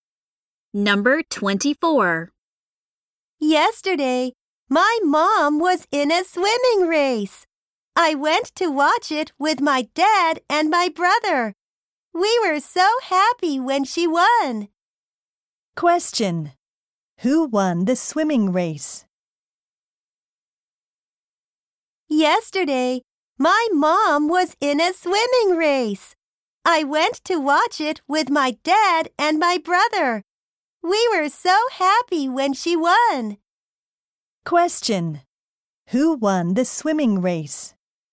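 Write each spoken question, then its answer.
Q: Who won the swimming race?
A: The boy's/girl's mother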